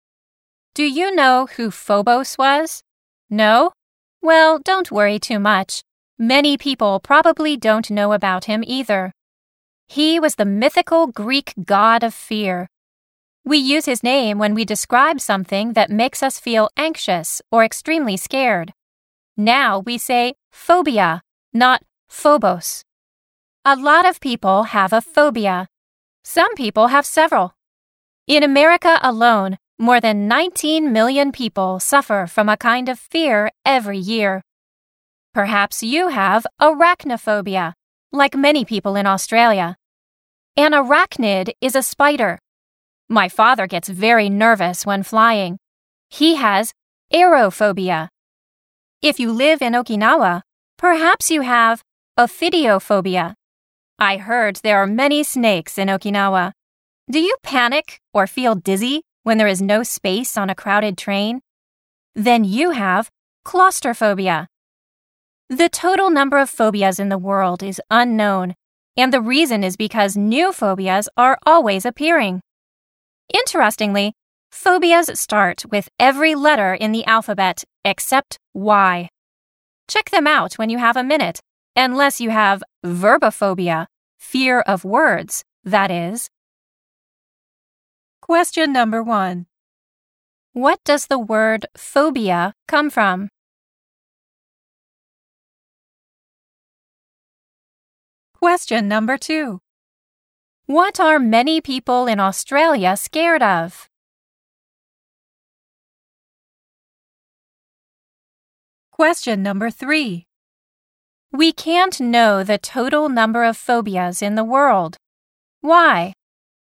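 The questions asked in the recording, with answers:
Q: What does the word phobia come from?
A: The name of Phobos, the mythical Greek god of fear.

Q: What are many people in Australia scared of?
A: Spiders.

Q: We can't know the total number of phobias in the world. Why?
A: Because new phobias are always appearing.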